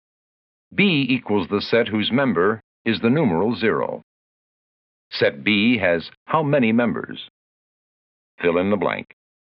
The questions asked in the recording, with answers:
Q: Set B has how many members?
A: If you wrote 1, you're right.